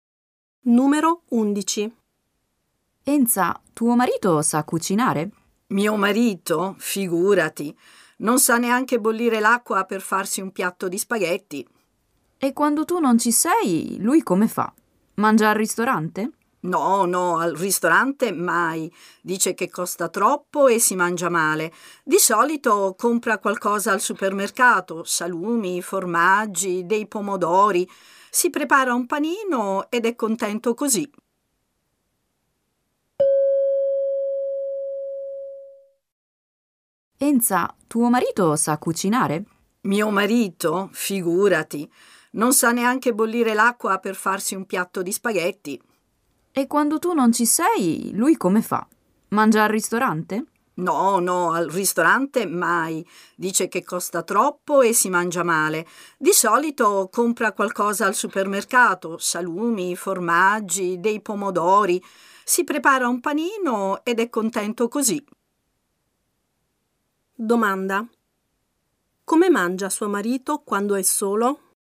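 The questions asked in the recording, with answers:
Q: Come mangia suo marito quando è solo?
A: Compra qualcosa al supermercato e si prepara un panino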